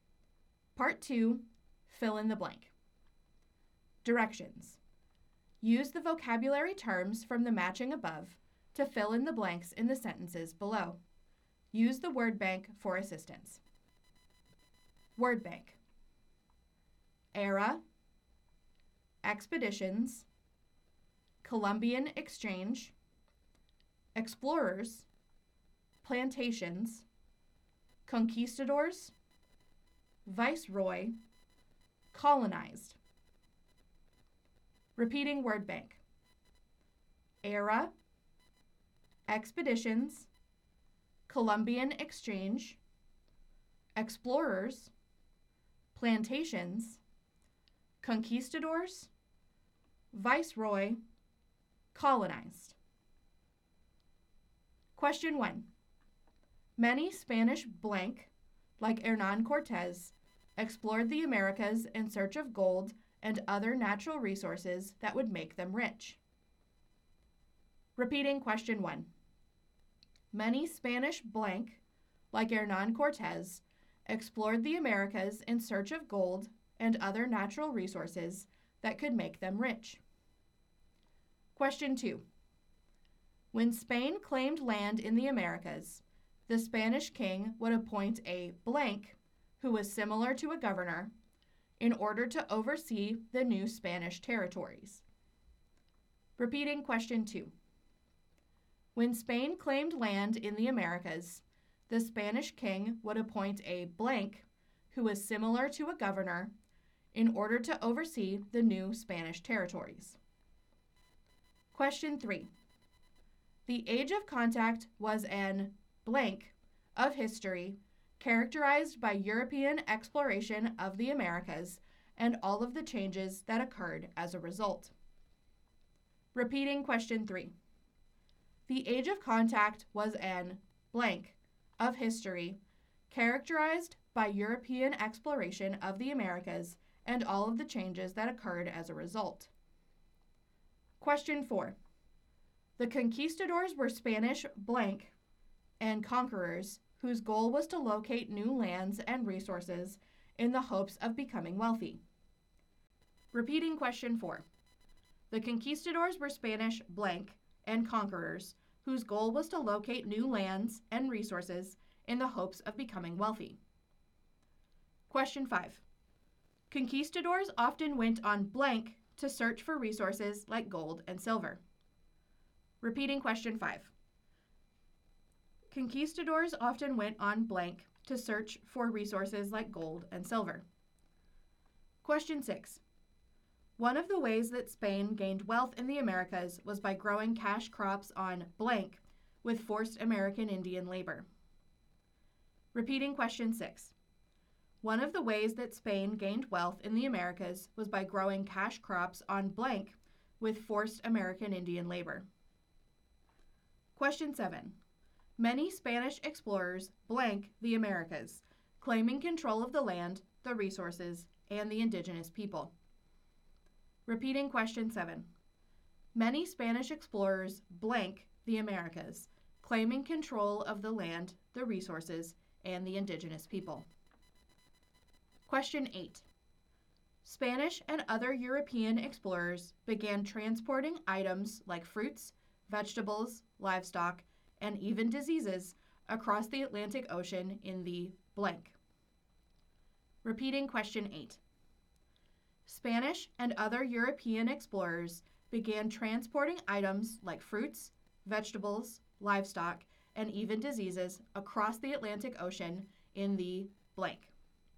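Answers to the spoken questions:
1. conquistadors
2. viceroy
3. era
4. explorers
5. expeditions
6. plantations
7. colonized
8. Columbian Exchange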